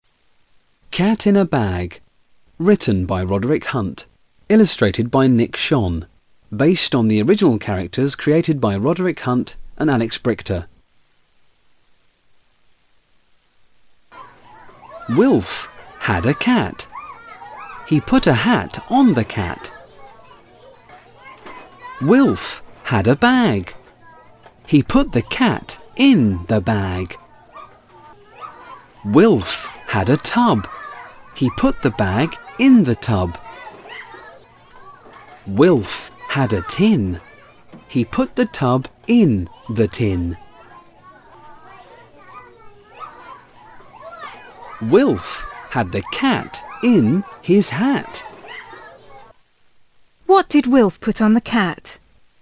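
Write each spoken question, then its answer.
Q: What did Wilf put on the cat?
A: A hat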